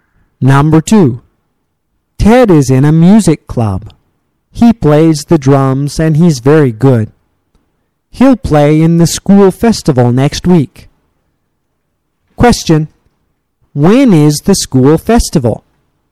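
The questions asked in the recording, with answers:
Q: When is the school festival?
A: Next week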